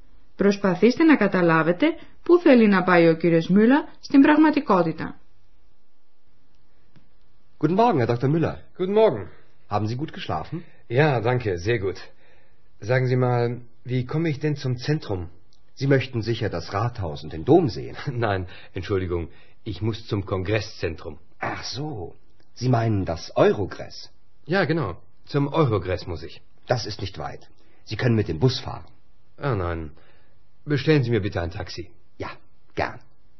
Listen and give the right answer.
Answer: Ο κύριος Μιούλα δεν θέλει να πάει στο κέντρο της πόλης, αλλά στο κέντρο συνεδρίων του Άχεν, που στο Άχεν ονομάζεται Eurogress.